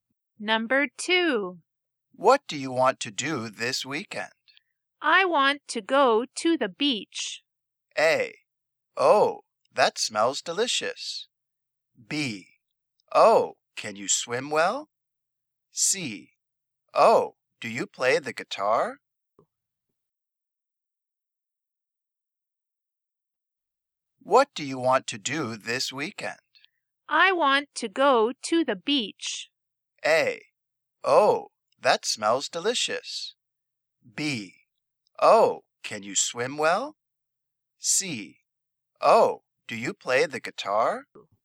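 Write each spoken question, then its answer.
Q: I want to go to the beach.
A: B: Oh, can you swim well?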